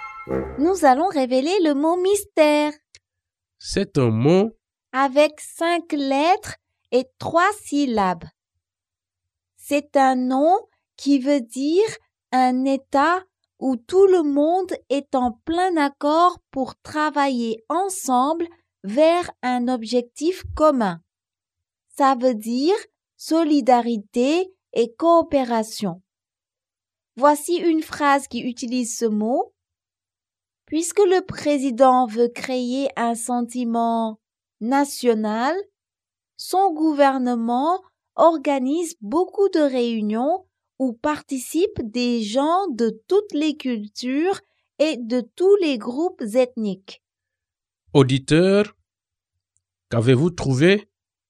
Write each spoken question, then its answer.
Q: Auditeur, qu'avez-vous trouvé?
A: Le mot mystère est unité.